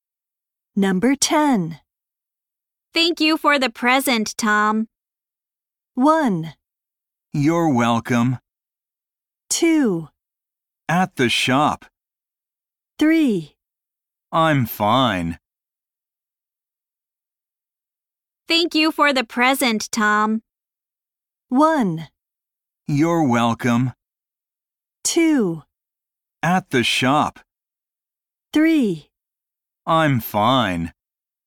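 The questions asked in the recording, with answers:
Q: Thank you for the present, Tom.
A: 1: You're welcome.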